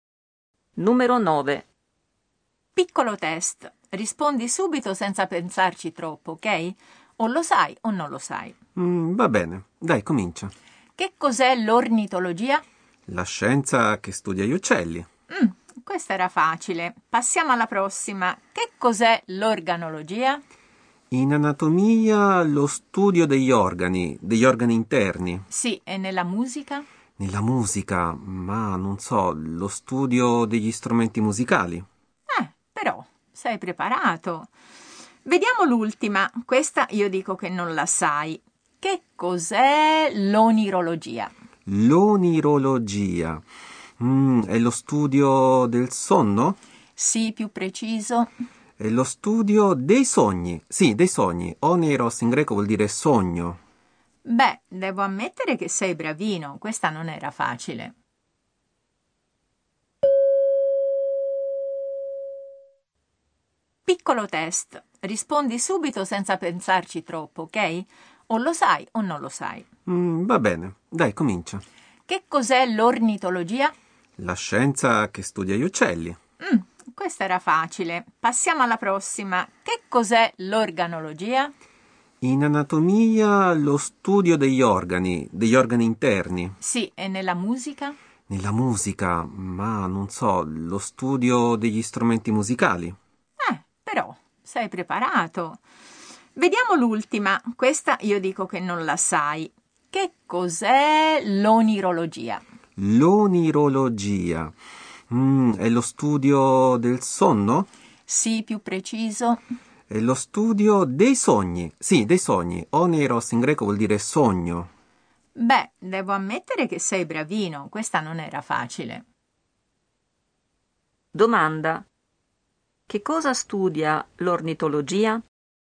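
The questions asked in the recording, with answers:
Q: Domanda. Che cosa studia l'ornitologia?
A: Gli uccelli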